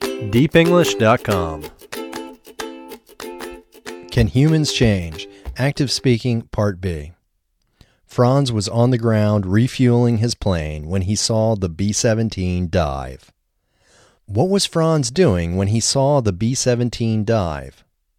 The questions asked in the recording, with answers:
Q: What was Franz doing when he saw the B-17 dive?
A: Franz was on the ground refueling when he saw the B-17 dive.